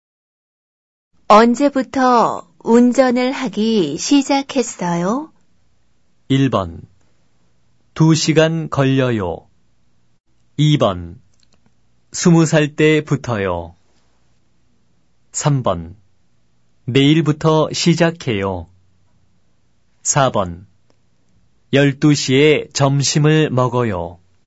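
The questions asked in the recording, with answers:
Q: 언제부터 운전을 하기 시작했어요?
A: 2: 20살 때부터요.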